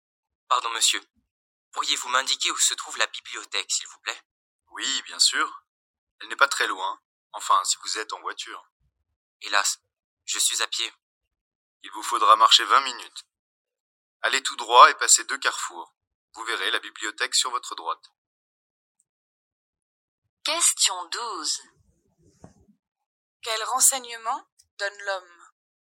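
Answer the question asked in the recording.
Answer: Le chemin vers la bibliothèque, à 20 minutes à pied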